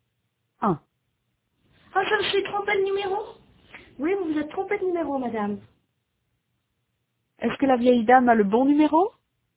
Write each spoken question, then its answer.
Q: Est-ce que la vieille dame a le bon numéro?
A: Non, elle s'est trompée de numéro.